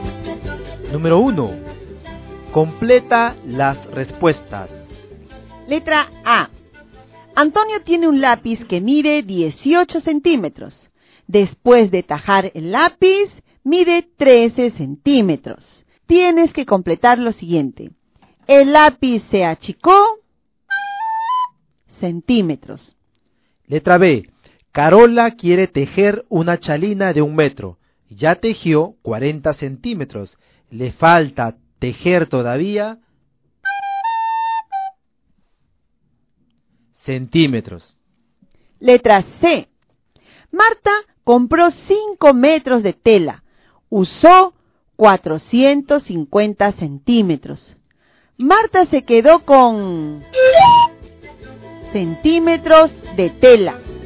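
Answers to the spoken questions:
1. 5 centímetros
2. 60 centímetros
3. 50 centímetros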